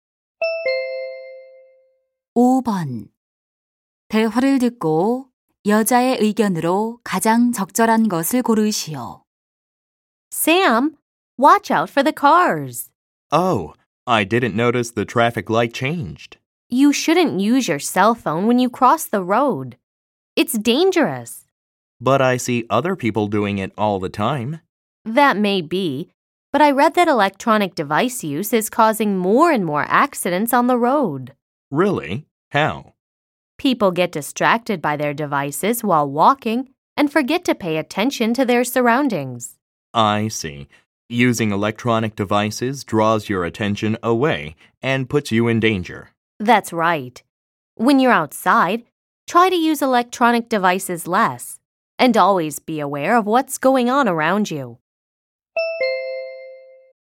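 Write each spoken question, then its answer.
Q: 대화를 듣고 여자의 의견으로 가장 적절한 것을 고르시오.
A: 길을 걸을 때 전자기기 사용을 줄이고 주변에 주의해야 한다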